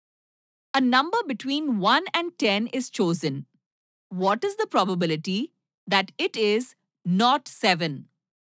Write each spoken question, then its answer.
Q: A number between 1 and 10 is chosen, what is the probability that it is not 7?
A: There are 9 other numbers, so 9 by 10.